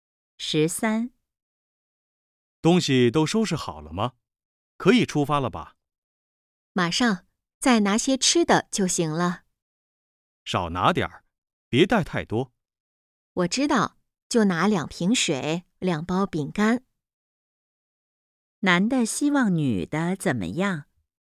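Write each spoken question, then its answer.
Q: 男的希望女的怎么样?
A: 少拿点儿东西,别带太多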